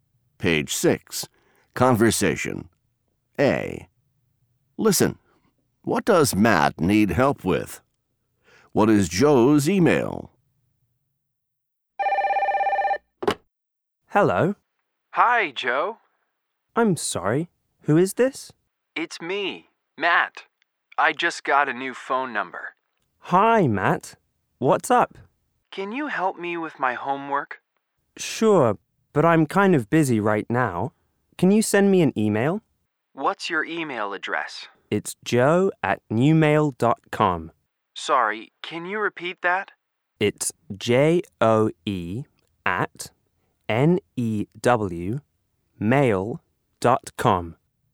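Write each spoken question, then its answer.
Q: What does Matt need help with?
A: His homework

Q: What is Joe's email?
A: joe@newmail.com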